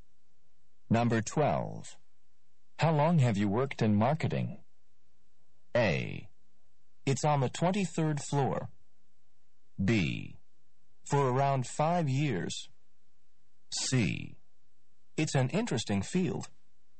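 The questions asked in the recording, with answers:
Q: How long have you worked in marketing?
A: B: For around 5 years.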